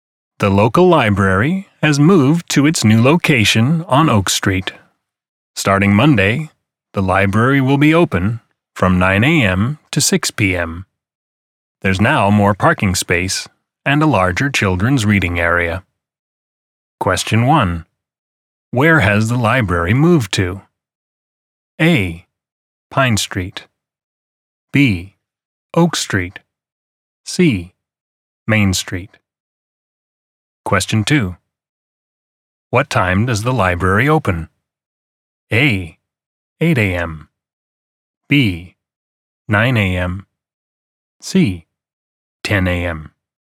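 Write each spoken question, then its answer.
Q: Where has the library moved to?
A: B: Oak Street.

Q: What time does the library open?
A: B: 9 a.m.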